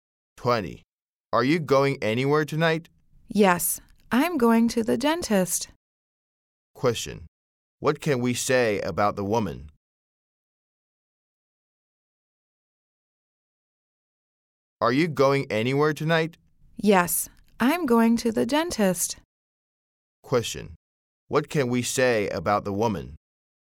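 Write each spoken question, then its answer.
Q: Question: What can we say about the woman?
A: She is going to the dentist tonight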